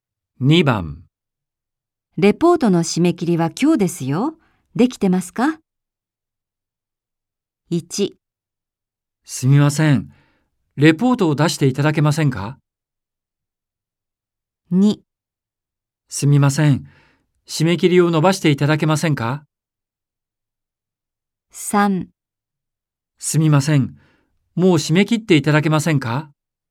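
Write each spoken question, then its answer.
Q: レポートの締め切りは今日ですよ。できてますか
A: 2: すみません。締め切りを伸ばしていただけませんか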